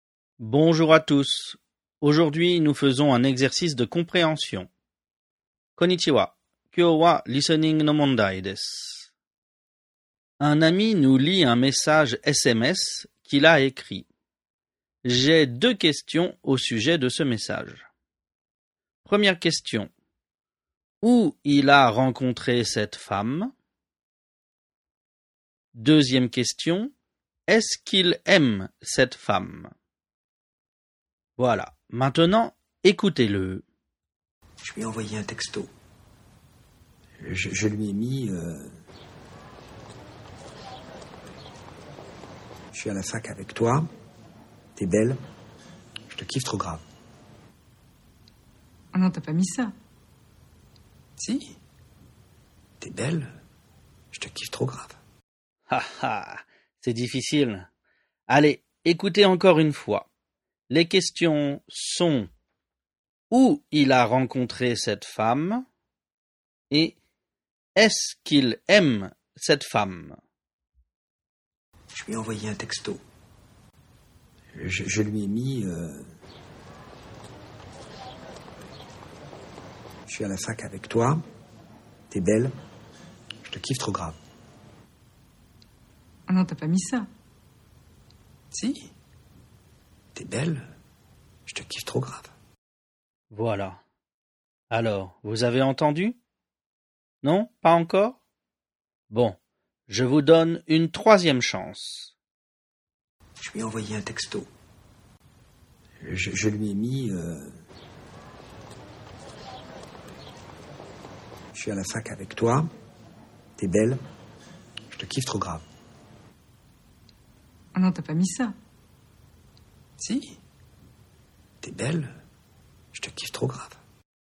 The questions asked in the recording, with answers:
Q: Où il a rencontré cette femme?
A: Il a rencontré cette femme à la fac, ou l'université.

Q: Est-ce qu'il aime cette femme?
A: Et il aime beaucoup cette femme.